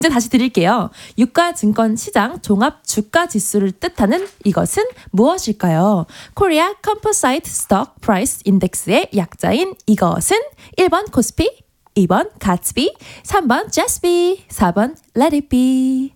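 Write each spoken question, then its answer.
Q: 유가증권시장 종합주가지수를 뜻하는 이것은 무엇일까요?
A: 1: 코스피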